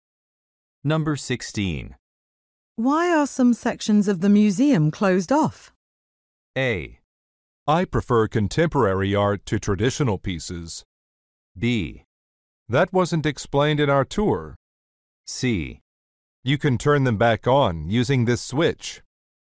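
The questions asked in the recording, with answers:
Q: Why are some sections of the museum closed off?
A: B: That wasn't explained in our tour.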